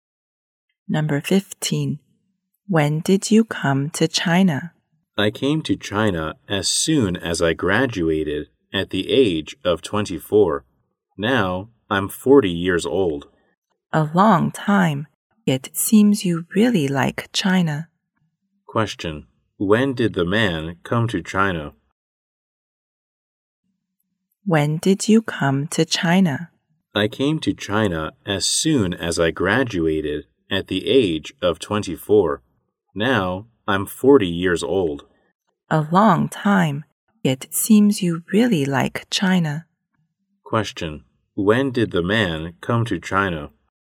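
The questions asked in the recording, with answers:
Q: When did the man come to China?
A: At the age of 24, when he graduated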